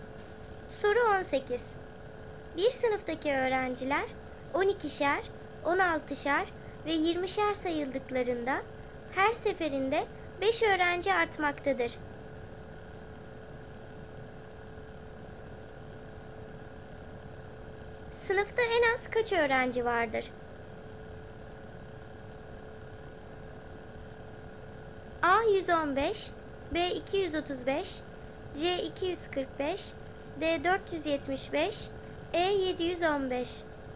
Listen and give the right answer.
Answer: Doğru cevap C 245.